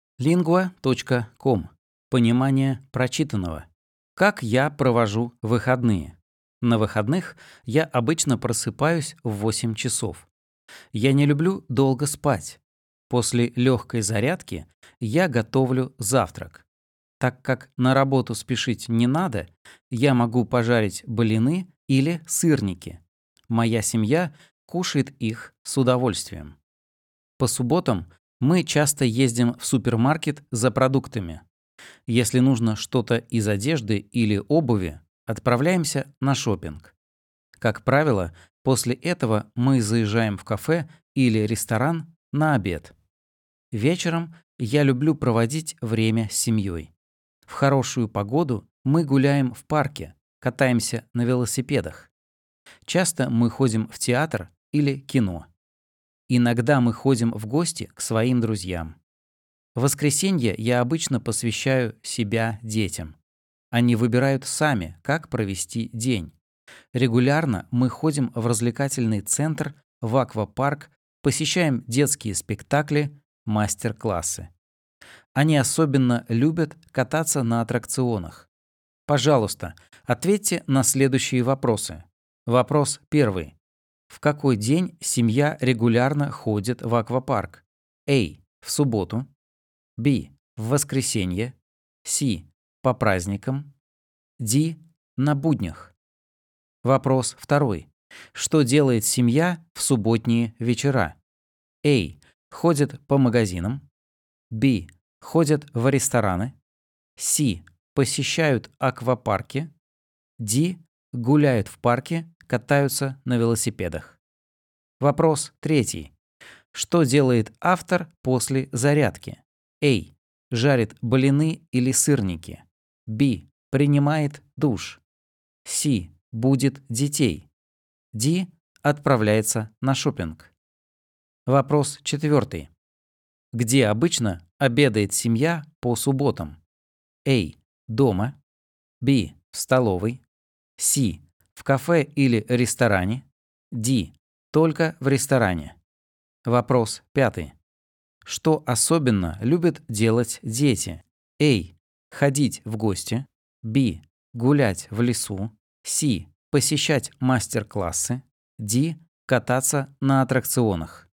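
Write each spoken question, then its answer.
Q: В какой день семья регулярно ходит в аквапарк?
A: B: В воскресенье.

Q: Что делает семья в субботние вечера?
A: D: Гуляют в парке, катаются на велосипедах.

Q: Что делает автор после зарядки?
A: A: Жарит блины или сырники.

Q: Где обычно обедает семья по субботам?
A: C: В кафе или ресторане.

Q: Что особенно любят делать дети?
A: D: Кататься на аттракционах.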